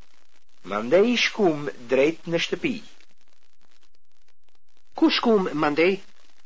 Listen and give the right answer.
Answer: Ju shkut mandej drejt në shtëpi.